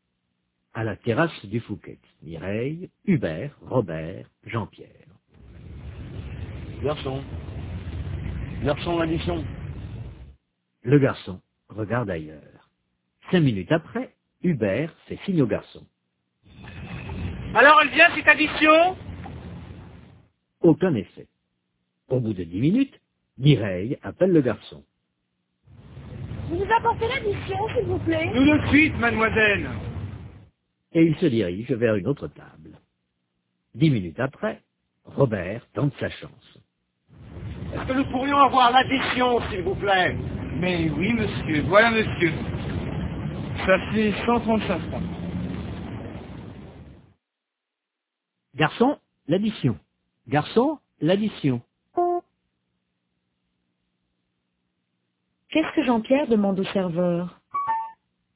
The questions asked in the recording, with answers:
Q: Qu'est-ce que Jean-Pierre demande au serveur?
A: L'addition.